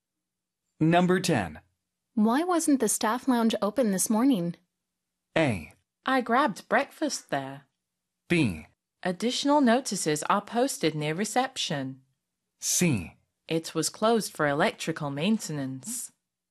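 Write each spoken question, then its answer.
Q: Why wasn't the staff lounge open this morning?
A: C: It was closed for electrical maintenance.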